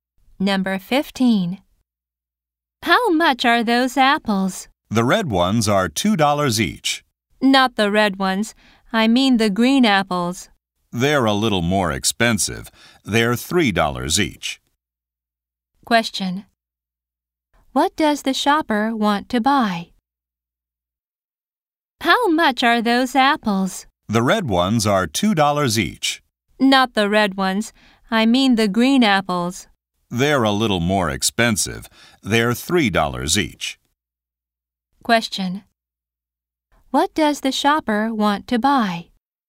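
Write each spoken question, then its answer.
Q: What does the shopper want to buy?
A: Green apples.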